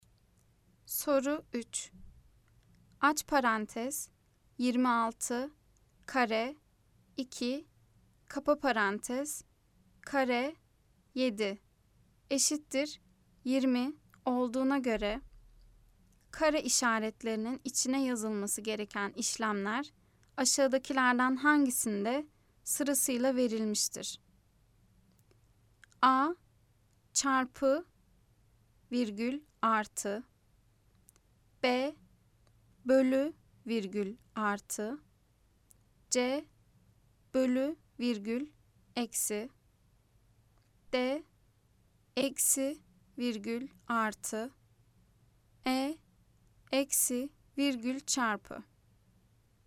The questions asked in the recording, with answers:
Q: Aç parantez 26 kare 2 kapa parantez kare 7 eşittir 20 olduğuna göre kare işaretlerinin içine yazılması gereken işlemler aşağıdakilerden hangisinde sırasıyla verilmiştir?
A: Cevap bolu bölü virgül artı.